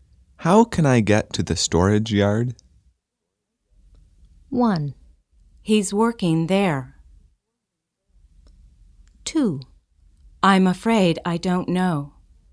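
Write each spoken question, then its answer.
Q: How can I get to the storage yard?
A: 2: I'm afraid I don't know.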